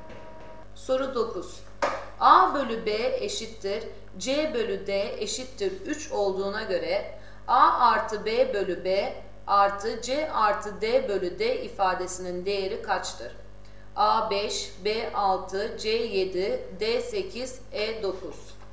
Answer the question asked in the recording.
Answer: Doğru cevap D 8.